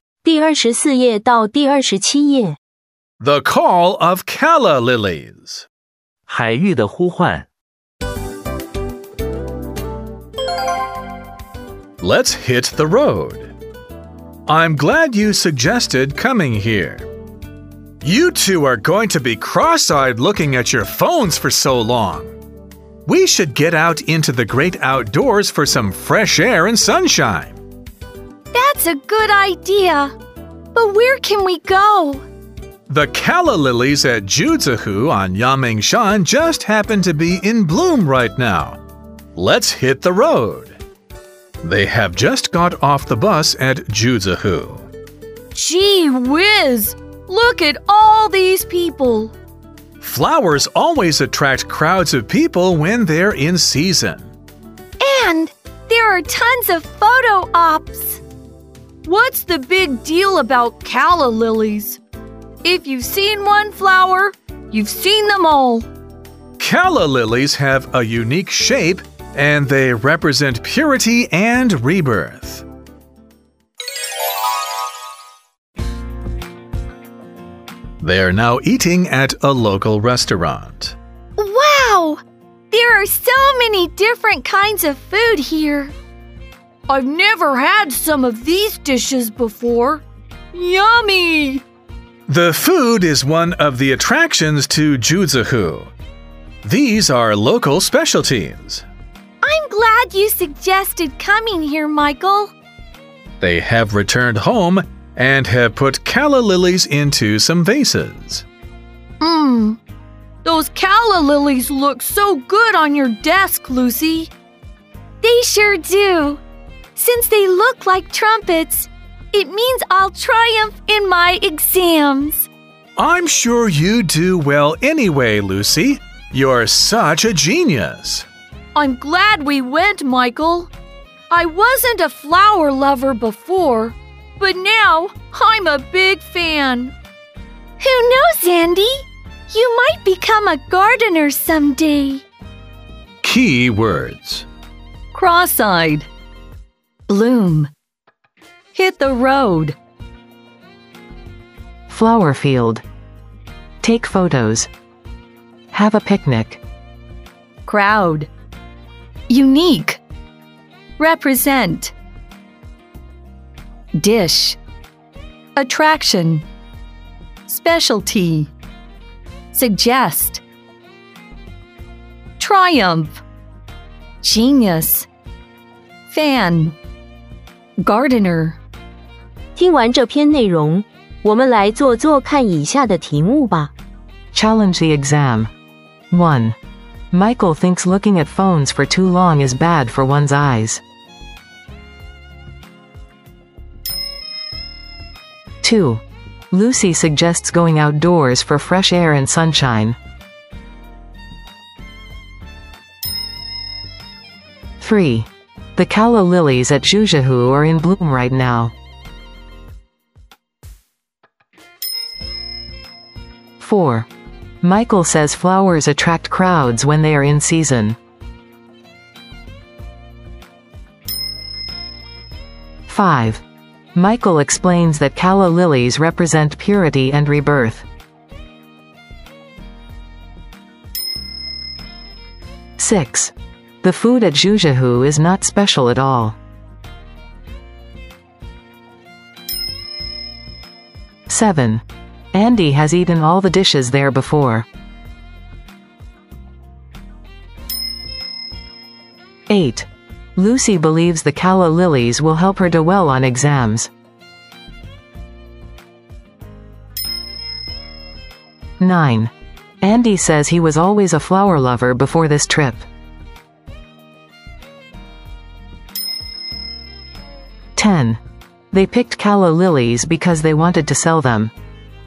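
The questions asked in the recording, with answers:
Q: The calla lilies at Juzahu are in bloom right now.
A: True

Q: The food at Juzahu is not special at all.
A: False

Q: Lucy believes the calla lilies will help her do well on exams.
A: True

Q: Andy says he was always a flower lover before this trip.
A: False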